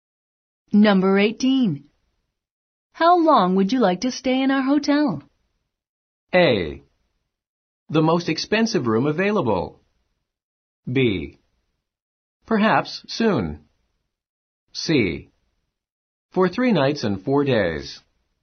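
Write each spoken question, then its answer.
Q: How long would you like to stay in our hotel?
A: C: For 3 nights and 4 days.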